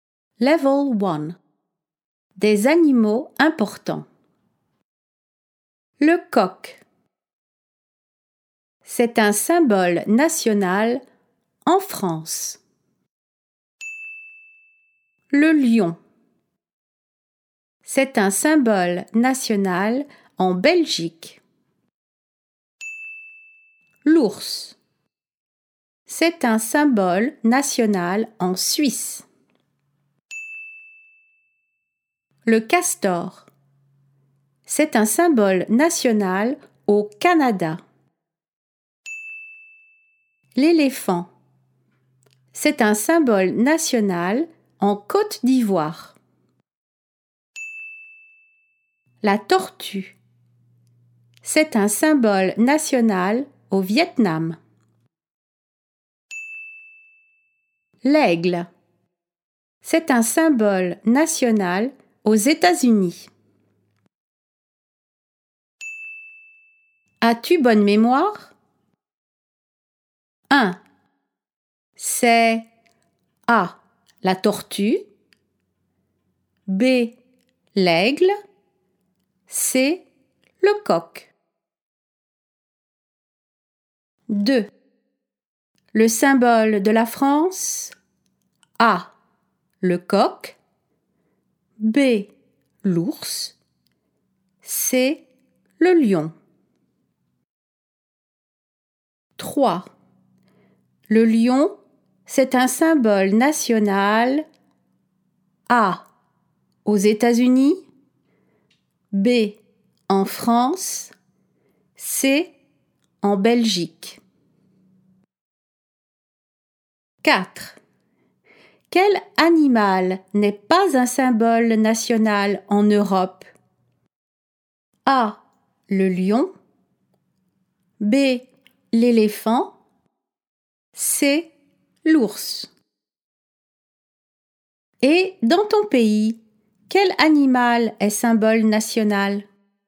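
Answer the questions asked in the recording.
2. A: Le coq
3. C: En Belgique
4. B: L'éléphant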